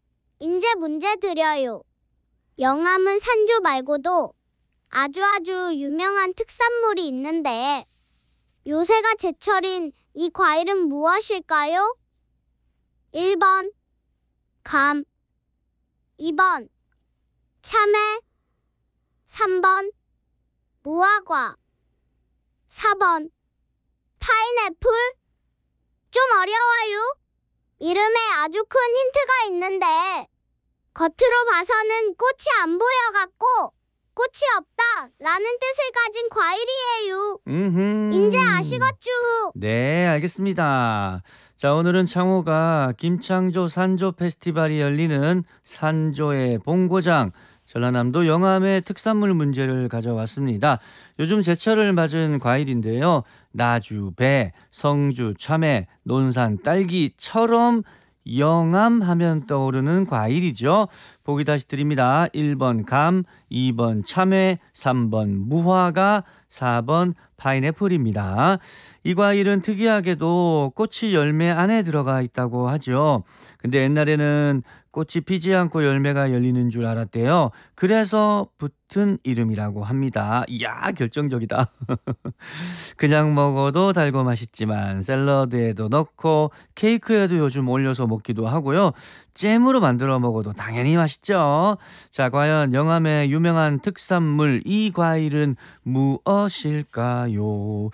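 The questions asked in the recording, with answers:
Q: 영암은 산조 말고도 아주아주 유명한 특산물이 있는데 요새가 제철인 이 과일은 무엇일까요?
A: 3번: 무화과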